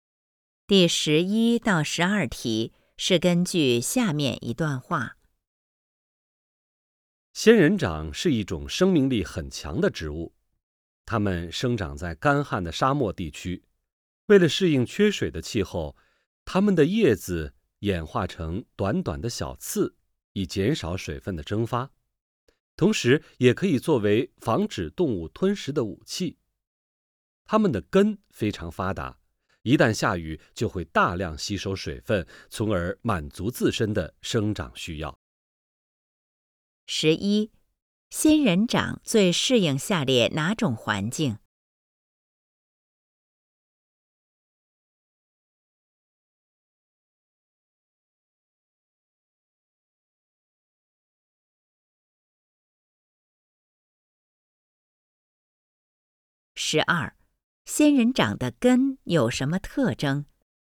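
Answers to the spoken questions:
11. 干旱的沙漠
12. 非常发达,下雨时能大量吸收水分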